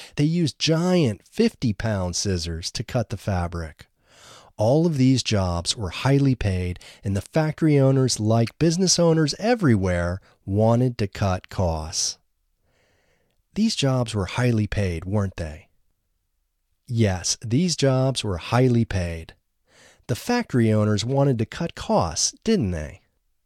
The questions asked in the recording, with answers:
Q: The factory owners wanted to cut costs, didn't they?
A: Yes, the factory owners wanted to cut costs.